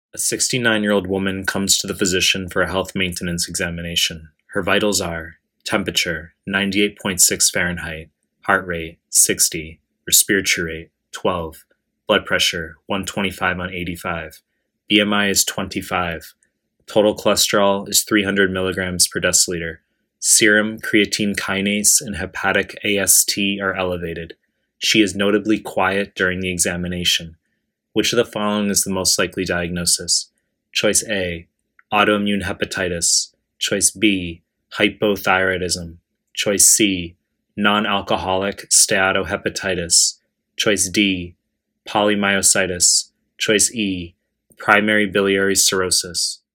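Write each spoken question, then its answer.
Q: Which of the following is the most likely diagnosis?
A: B: hypothyroidism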